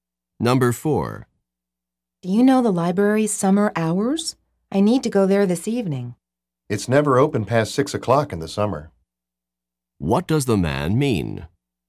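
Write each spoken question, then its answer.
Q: What does the man mean?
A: The library closes by 6 o'clock in summer, so it won't be open this evening.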